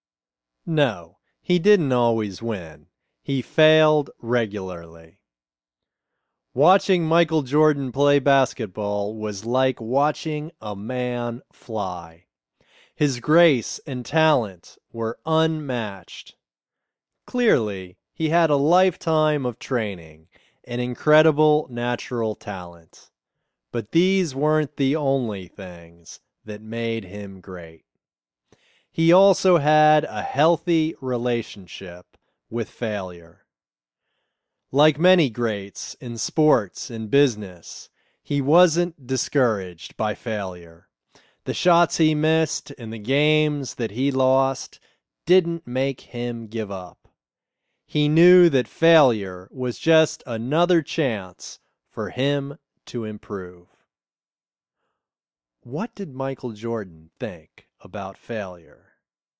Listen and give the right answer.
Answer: He thought that failure was just another chance for him to improve.